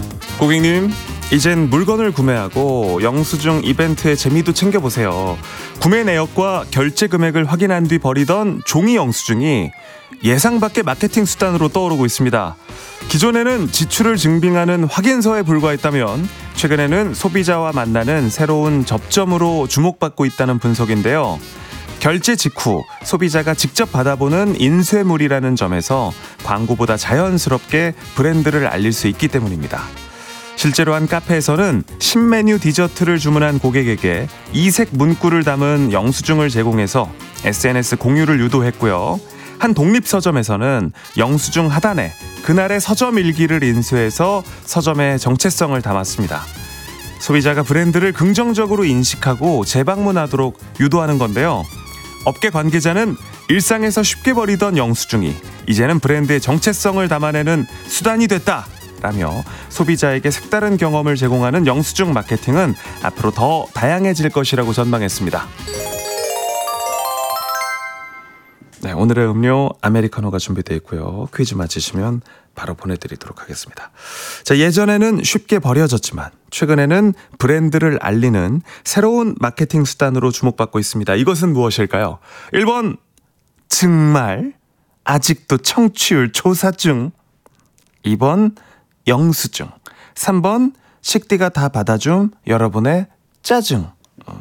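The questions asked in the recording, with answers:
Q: 이것은 무엇일까요?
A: 2: 영수증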